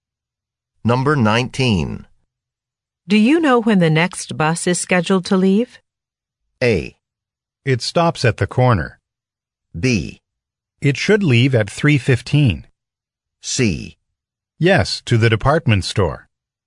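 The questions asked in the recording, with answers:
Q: Do you know when the next bus is scheduled to leave?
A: B: It should leave at 3:15.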